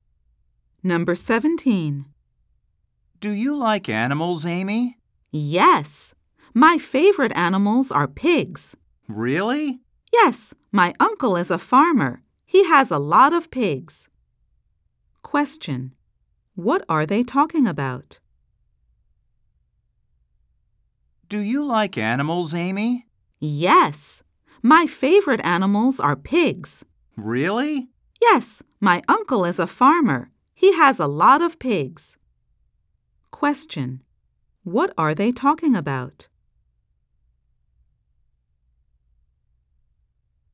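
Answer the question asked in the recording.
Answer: Amy's favorite animals (pigs).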